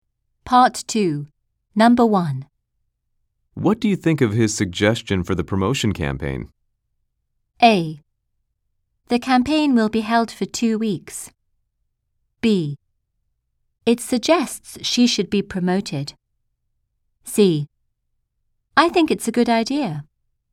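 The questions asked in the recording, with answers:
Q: What do you think of his suggestion for the promotion campaign?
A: C: I think it's a good idea.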